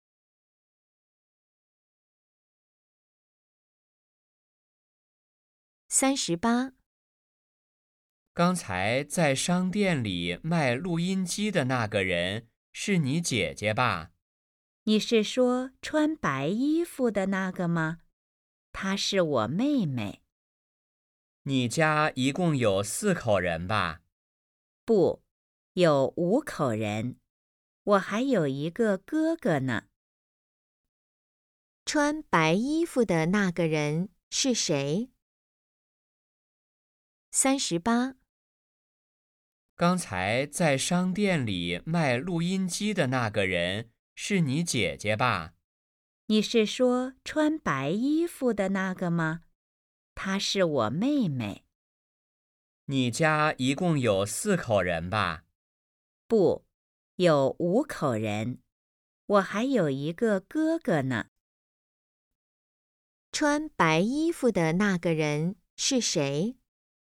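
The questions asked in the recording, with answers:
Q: 穿白衣服的那个人是谁?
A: 妹妹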